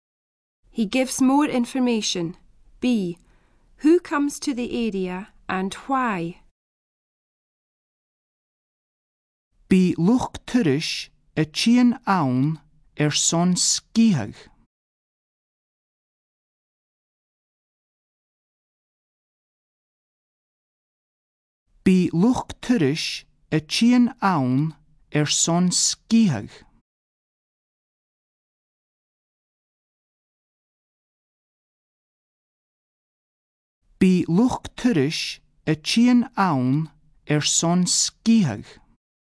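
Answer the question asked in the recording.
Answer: Tourists, to ski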